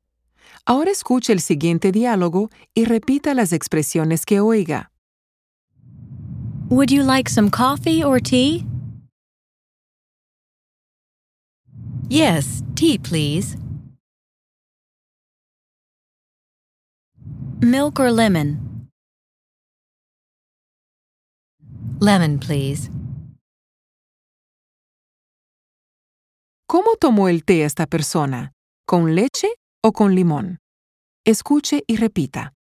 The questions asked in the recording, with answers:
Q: ¿Cómo tomó el té esta persona? ¿Con leche o con limón?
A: Con limón.